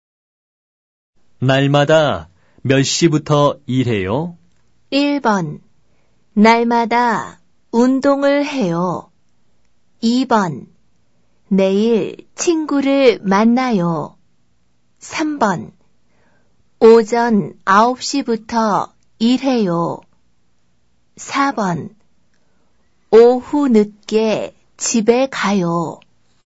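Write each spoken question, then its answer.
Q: 날마다 몇 시부터 일해요?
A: 3: 오전 9시부터 일해요.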